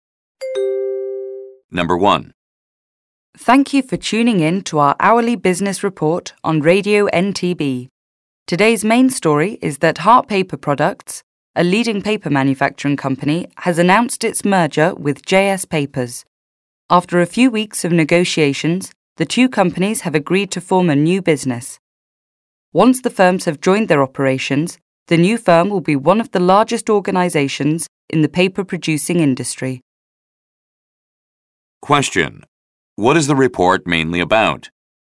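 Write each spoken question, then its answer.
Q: What is the report mainly about?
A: The merger of Hart Paper Products with JS Papers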